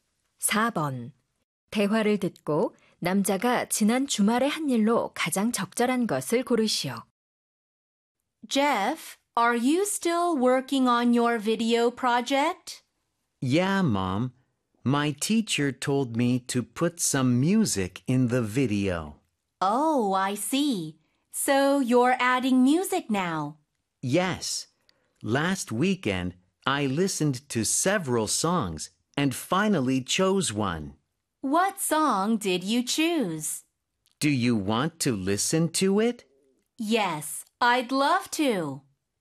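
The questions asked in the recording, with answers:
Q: 대화를 듣고 남자가 지난 주말에 한 일로 가장 적절한 것을 고르시오.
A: 여러 노래를 듣고 영상에 넣을 노래를 골랐다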